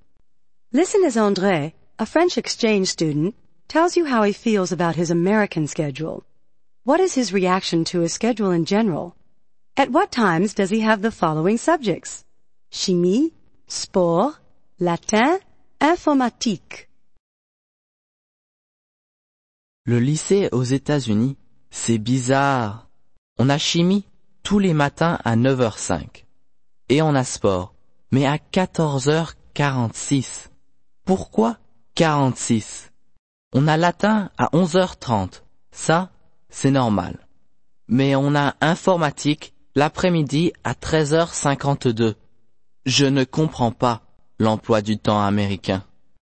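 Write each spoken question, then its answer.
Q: What is his reaction to his schedule in general?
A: He finds it strange (bizarre) and doesn't understand it

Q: At what times does he have the following subjects?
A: Chimie 9:05, sport 14:46 (2:46 pm), latin 11:30, informatique 13:52 (1:52 pm)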